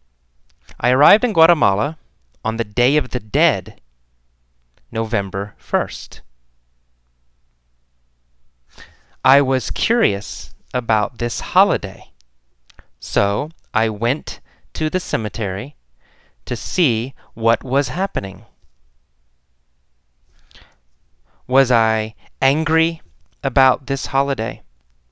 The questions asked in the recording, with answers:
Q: Was I angry about this holiday?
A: No, I wasn't angry about this holiday.